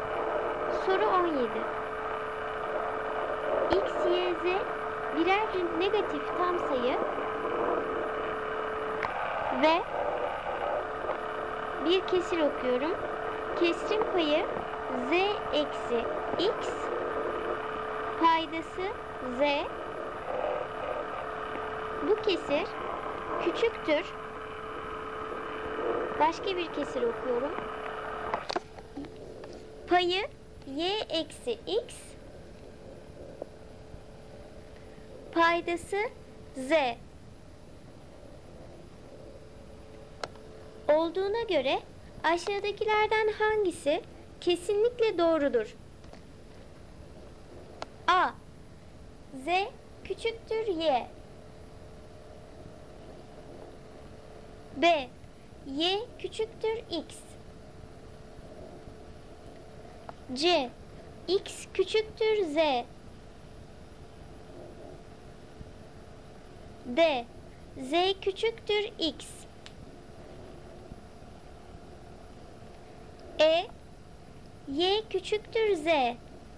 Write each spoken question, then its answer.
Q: Olduğuna göre aşağıdakilerden hangisi kesinlikle doğrudur?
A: Doğru cevap E seçeneği. Y küçüktür Z.